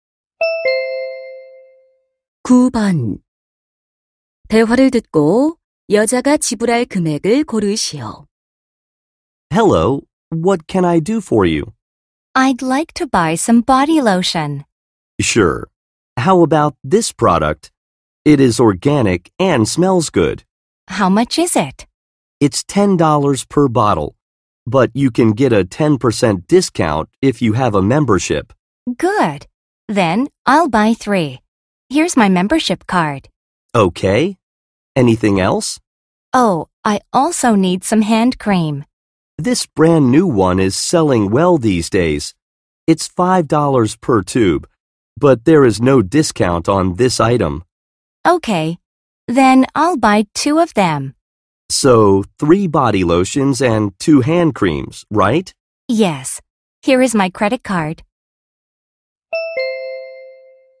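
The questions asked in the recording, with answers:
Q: 대화를 듣고 여자가 지불할 금액을 고르시오.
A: $37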